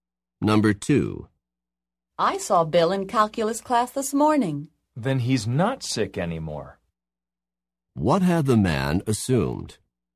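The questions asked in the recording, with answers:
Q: What had the man assumed?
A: That Bill was still sick.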